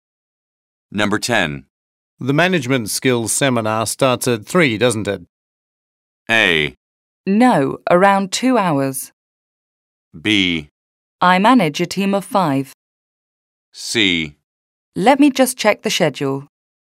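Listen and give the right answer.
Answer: C: Let me just check the schedule.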